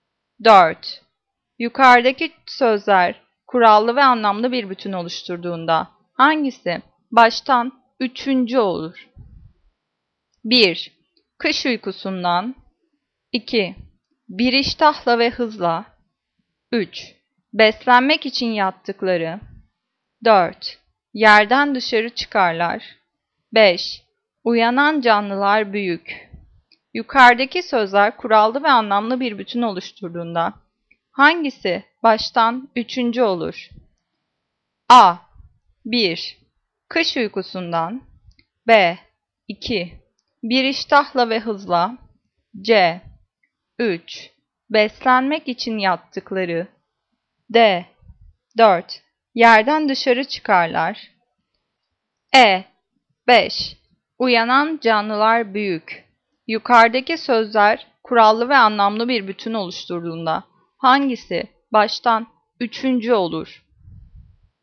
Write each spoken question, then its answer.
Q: Yukarıdaki sözler kurallı ve anlamlı bir bütün oluşturduğunda hangisi baştan üçüncü olur?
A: Cevap B. Bir iştahla ve hızla.